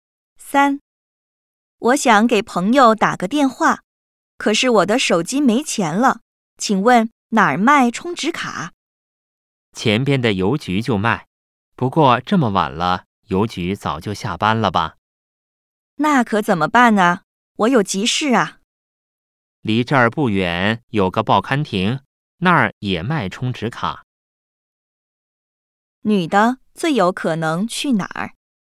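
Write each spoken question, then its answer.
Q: 女的最有可能去哪儿?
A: 报刊亭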